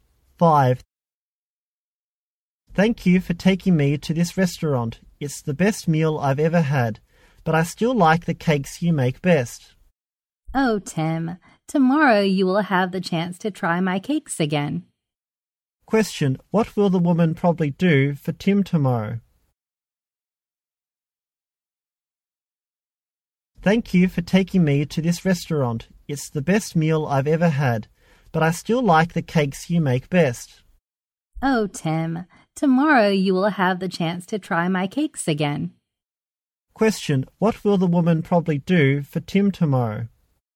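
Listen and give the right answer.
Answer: Make cakes for him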